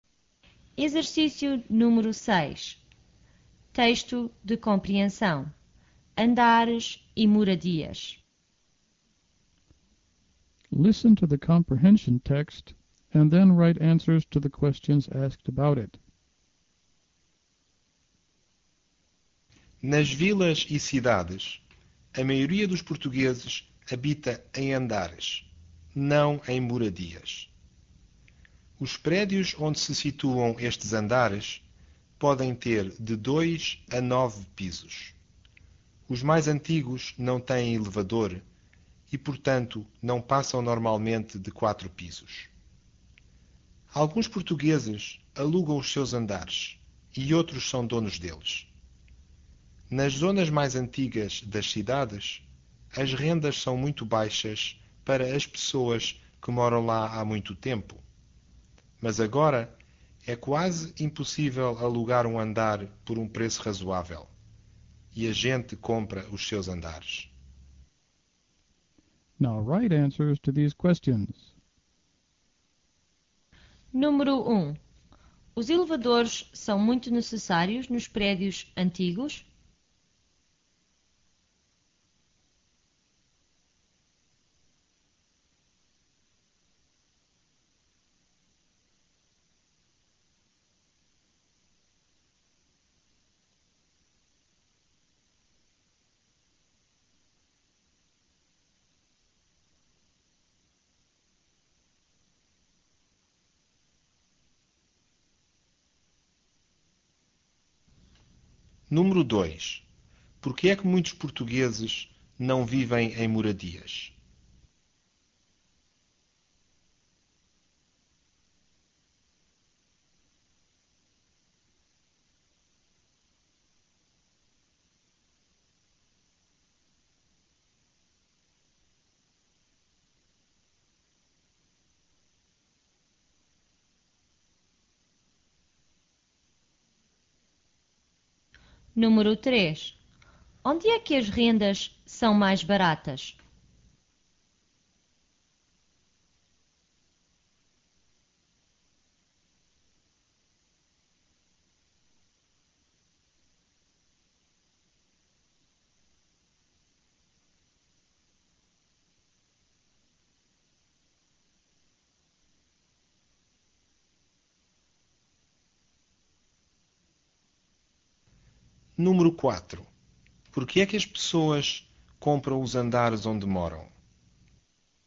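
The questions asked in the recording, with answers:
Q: Onde é que as rendas são mais baratas?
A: Nas zonas mais antigas das cidades, para quem mora lá há muito tempo.

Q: Por que é que as pessoas compram os andares onde moram?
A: Porque é quase impossível alugar um andar por um preço razoável.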